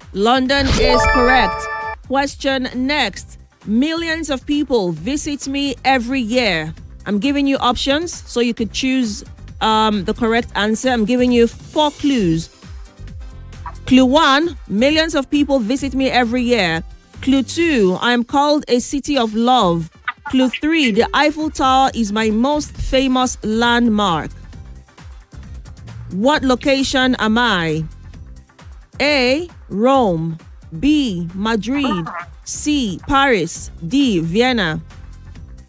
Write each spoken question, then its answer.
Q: What location am I?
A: Paris is correct.